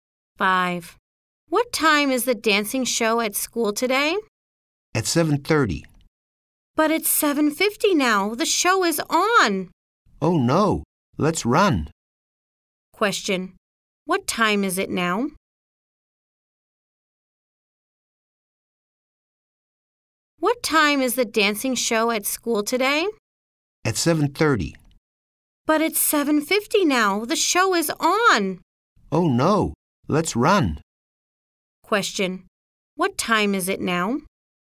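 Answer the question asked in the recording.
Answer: 7:50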